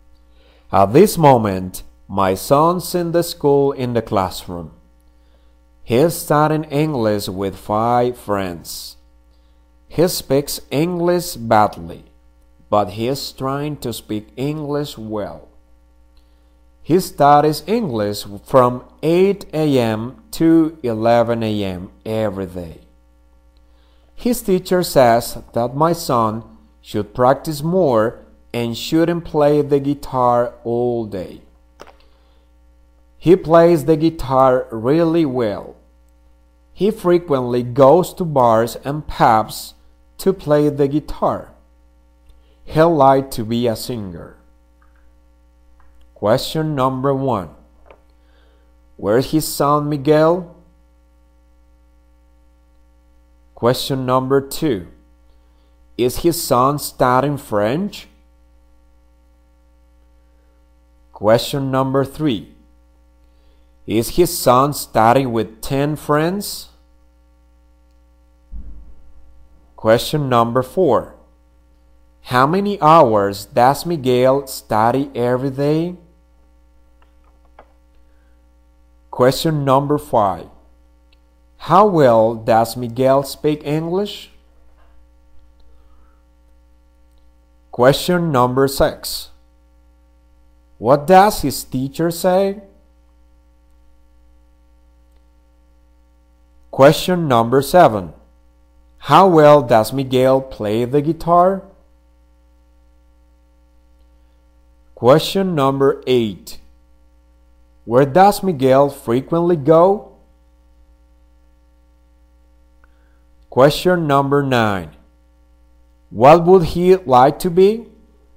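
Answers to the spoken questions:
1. At school in the classroom
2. No, he's studying English
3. No, with five friends
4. Three hours
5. Badly
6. He should practice more and shouldn't play the guitar all day
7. Really well
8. To bars and pubs
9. A singer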